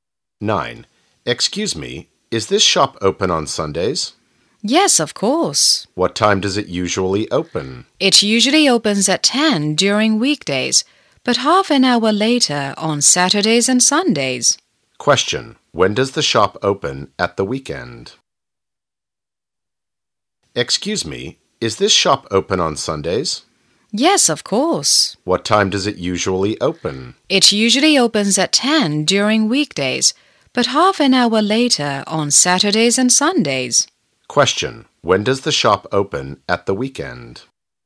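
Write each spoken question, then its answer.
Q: When does the shop open at the weekend?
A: At 10:30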